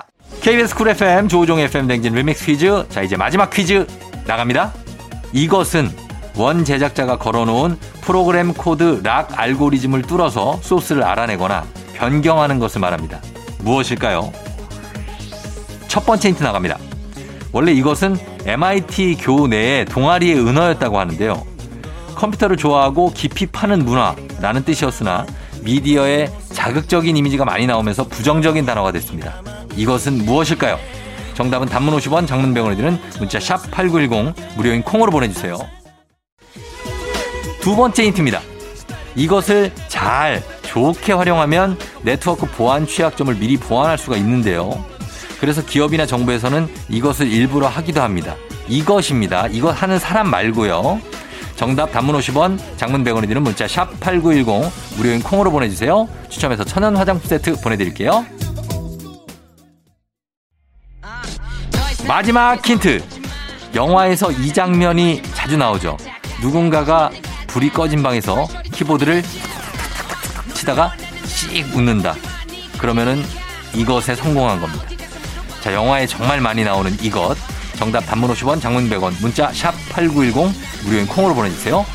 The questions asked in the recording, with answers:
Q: 이것은 무엇일까요?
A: 공개합니다. 두구두구두구두구두구두구두구두구 해킹이죠.